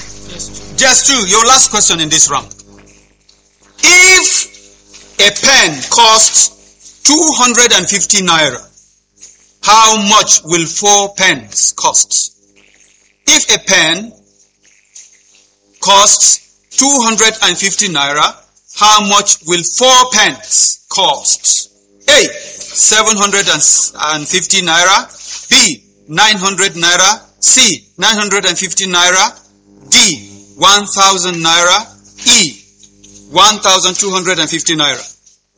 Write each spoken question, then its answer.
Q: If a pen costs 250 naira, how much will 4 pens cost?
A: 1000 naira!